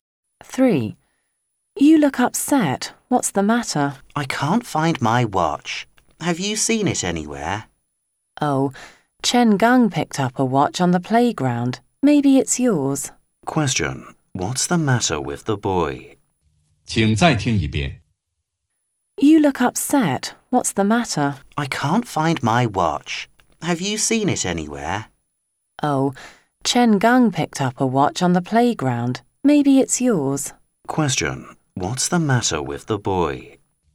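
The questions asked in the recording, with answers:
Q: What's the matter with the boy?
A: He can't find his watch.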